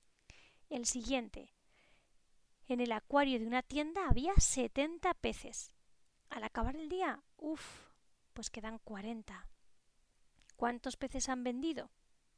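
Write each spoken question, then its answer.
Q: ¿Cuántos peces han vendido?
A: 30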